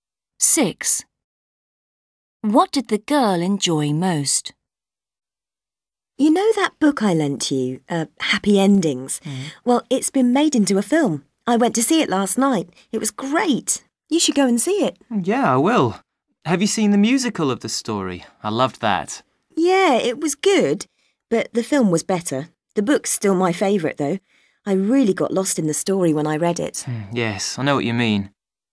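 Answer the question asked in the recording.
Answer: the book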